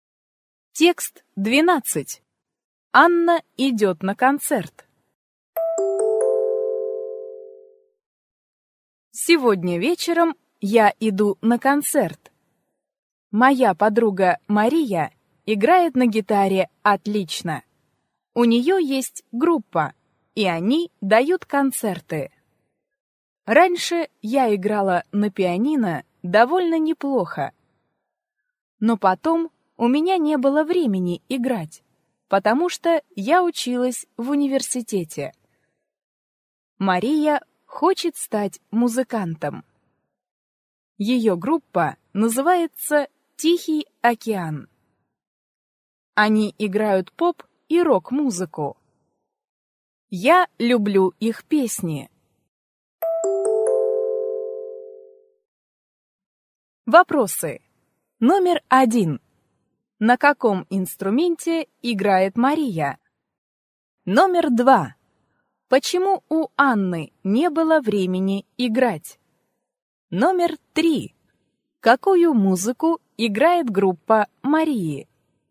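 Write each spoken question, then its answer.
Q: На каком инструменте играет Мария?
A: На гитаре

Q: Почему у Анны не было времени играть?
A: Потому что она училась в университете

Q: Какую музыку играет группа Марии?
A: Поп и рок-музыку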